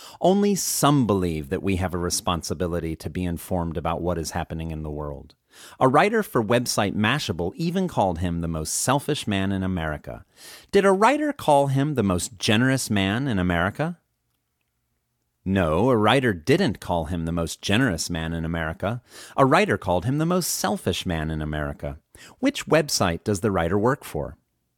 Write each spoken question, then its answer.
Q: Which website does the writer work for?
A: The writer works for the website Mashable.